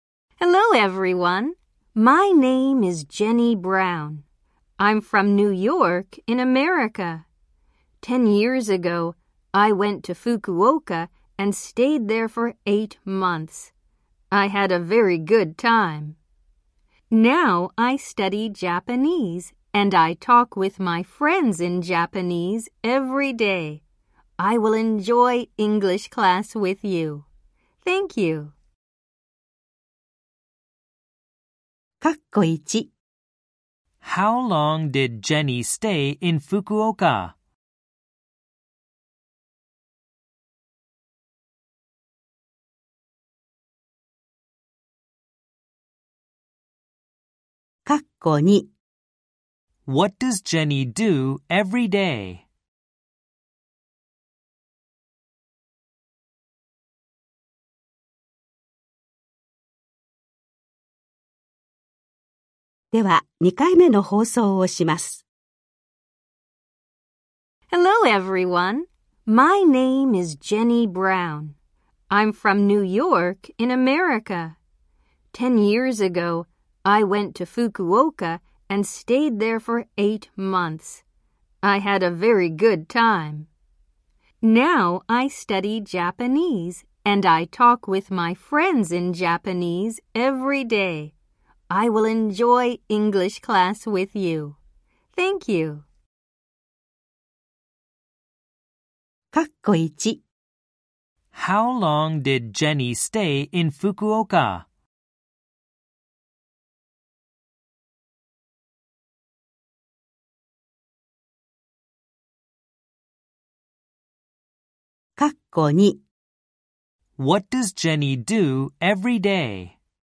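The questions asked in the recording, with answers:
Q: How long did Jenny stay in Fukuoka?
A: For 8 months.

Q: What does Jenny do every day?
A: She talks with her friends in Japanese.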